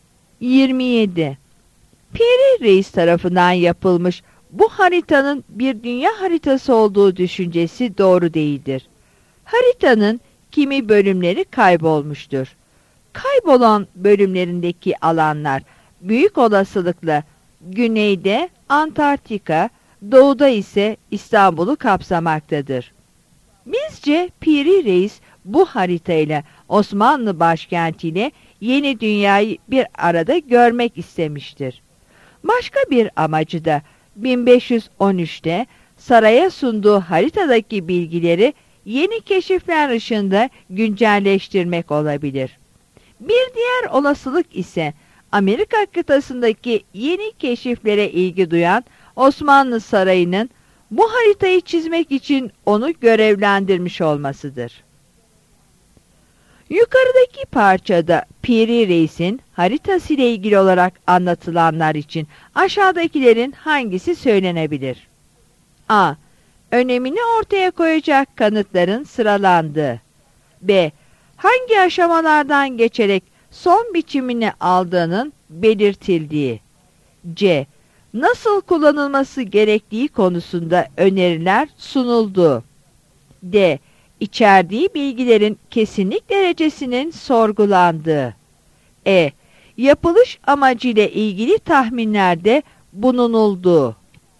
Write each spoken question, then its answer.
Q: Yukarıdaki parçada Piri Reis'in haritası ile ilgili olarak anlatılanlar için aşağıdakilerin hangisi söylenebilir?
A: Yanıt E'dir.